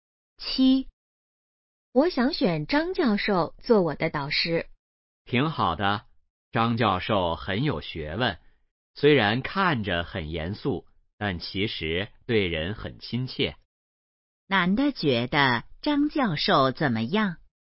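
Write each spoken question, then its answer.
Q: 男的觉得张教授怎么样?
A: 很有学问,对人很亲切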